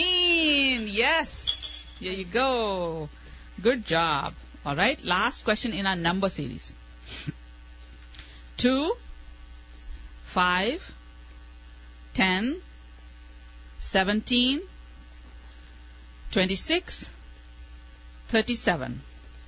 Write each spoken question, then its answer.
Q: 2, 5, 10, 17, 26, 37.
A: 50.